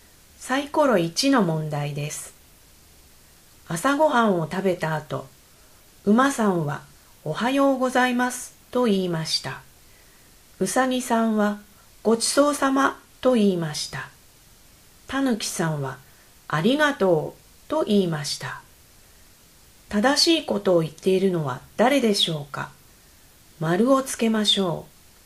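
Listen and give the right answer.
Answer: うさぎさん(ごちそうさま)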